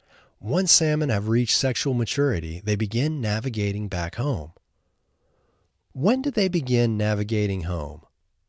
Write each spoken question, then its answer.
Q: When do they begin navigating home?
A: They begin navigating home once they have reached sexual maturity.